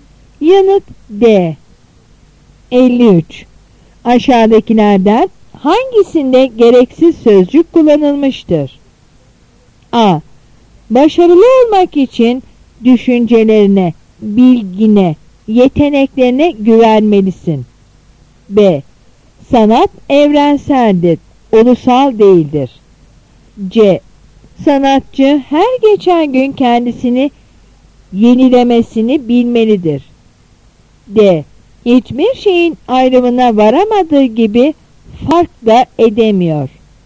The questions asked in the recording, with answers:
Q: Aşağıdakilerden hangisinde gereksiz sözcük kullanılmıştır?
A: Yanıt D.